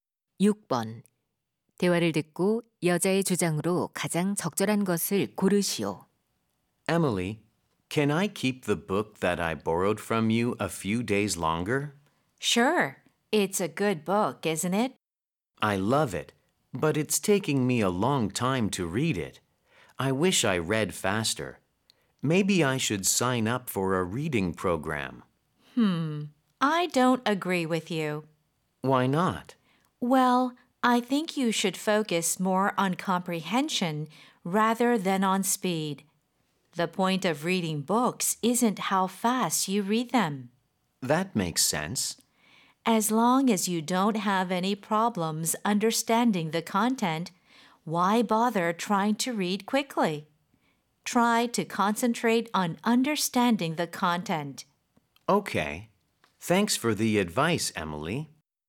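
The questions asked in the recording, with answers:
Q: 대화를 듣고 여자의 주장으로 가장 적절한 것을 고르시오.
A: 책은 빨리 읽기보다 내용 이해에 집중해야 한다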